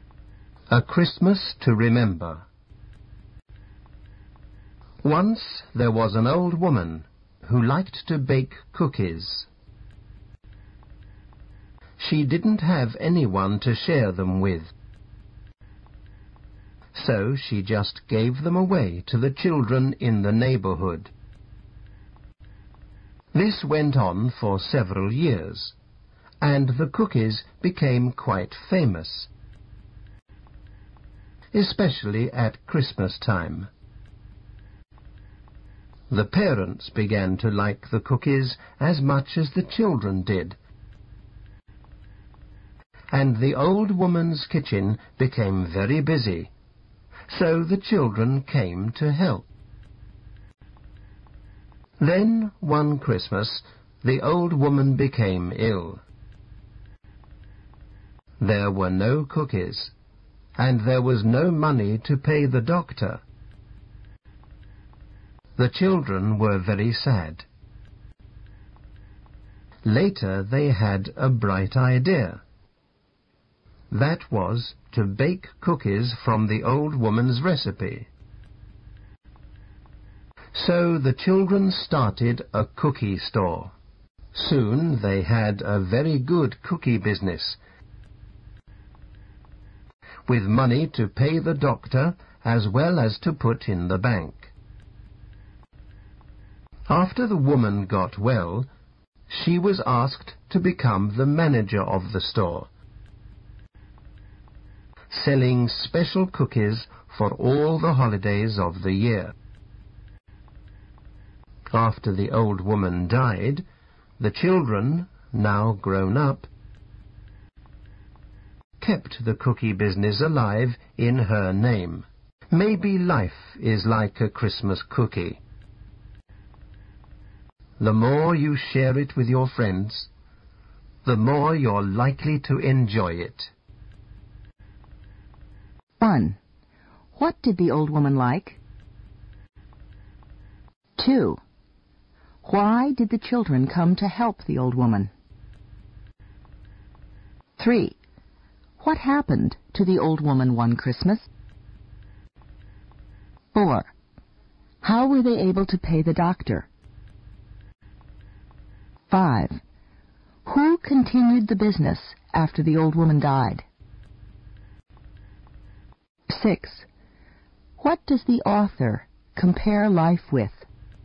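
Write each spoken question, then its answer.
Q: What did the old woman like?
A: Baking cookies

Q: Why did the children come to help the old woman?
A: Her kitchen became very busy

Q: What happened to the old woman one Christmas?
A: She became ill

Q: How were they able to pay the doctor?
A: The children started a cookie store

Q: Who continued the business after the old woman died?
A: The children, now grown up

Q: What does the author compare life with?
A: A Christmas cookie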